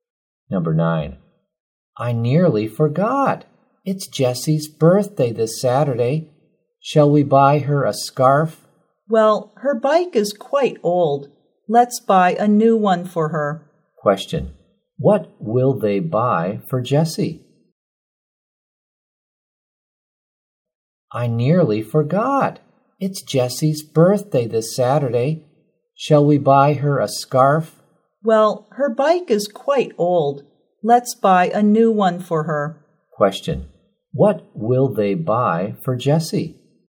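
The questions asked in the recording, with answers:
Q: Question. What will they buy for Jessie?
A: A new bike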